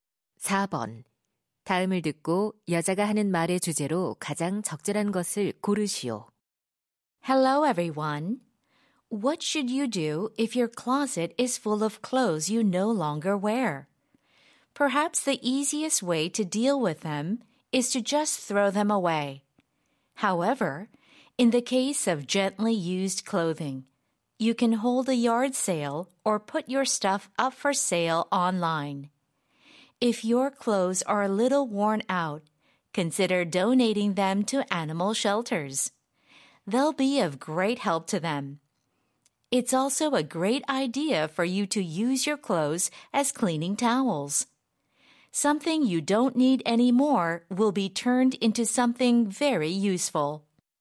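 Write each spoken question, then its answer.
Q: 다음을 듣고 여자가 하는 말의 주제로 가장 적절한 것을 고르시오.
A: 더 이상 입지 않는 옷을 처리하는 방법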